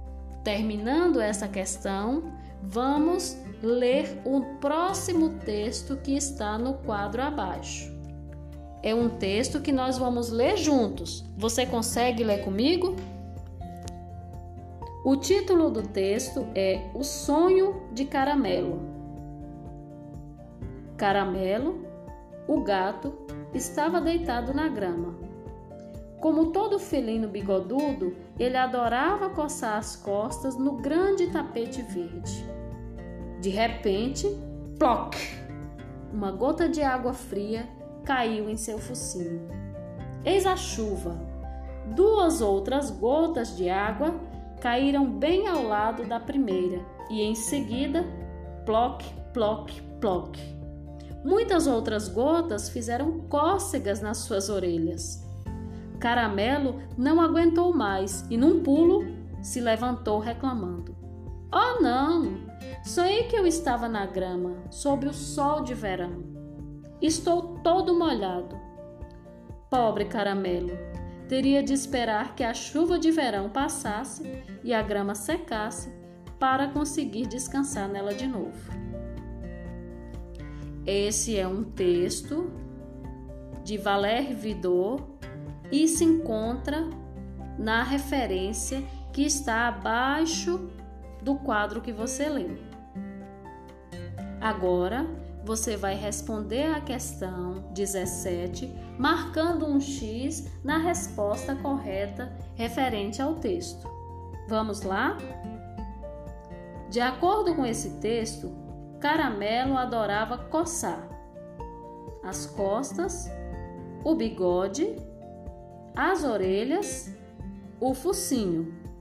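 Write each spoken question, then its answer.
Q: De acordo com esse texto, Caramelo adorava coçar as costas, o bigode, as orelhas, o focinho.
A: A: as costas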